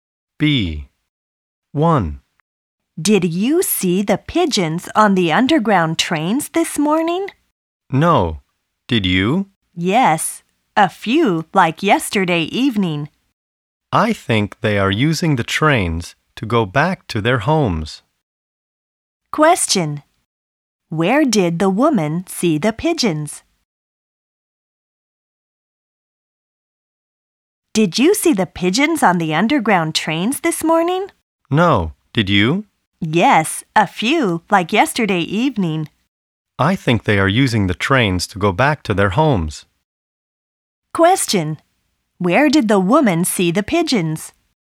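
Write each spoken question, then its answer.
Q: Where did the woman see the pigeons?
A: On the underground trains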